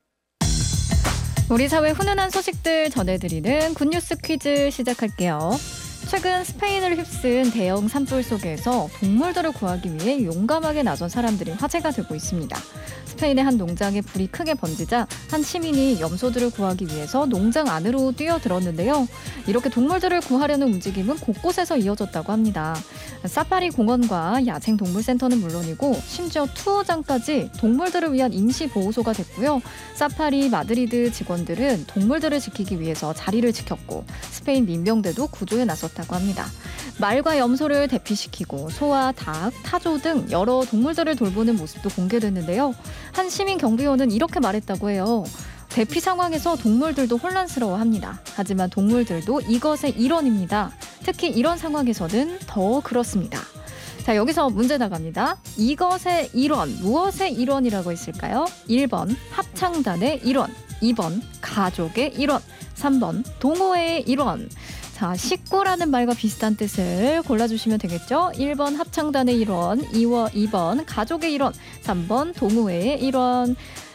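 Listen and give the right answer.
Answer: 2번: 가족의 일원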